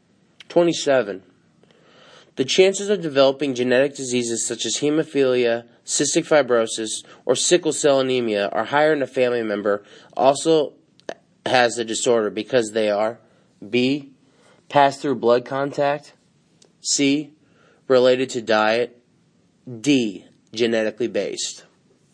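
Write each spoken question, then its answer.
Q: The chances of developing genetic diseases such as hemophilia, cystic fibrosis, or sickle cell anemia are higher in a family member also has the disorder because they are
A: D: genetically based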